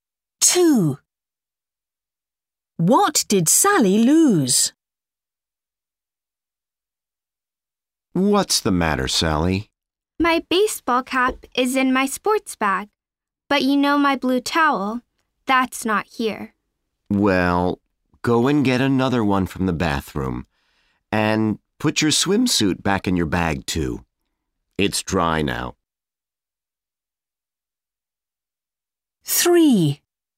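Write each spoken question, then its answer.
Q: What did Sally lose?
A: Her blue towel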